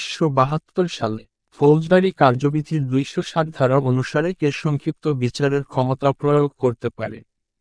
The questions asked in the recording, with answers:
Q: বাংলাদেশ বার council কোন সালে প্রতিষ্ঠা হয়?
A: 1972 সালে।